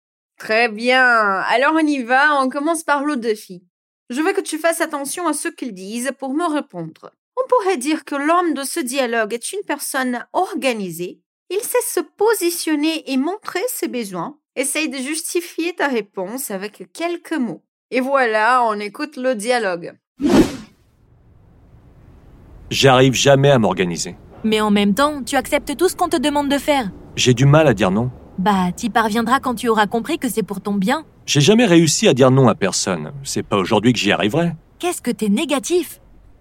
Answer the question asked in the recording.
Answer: S'il n'arrive jamais à s'organiser, alors il n'est pas une personne organisée.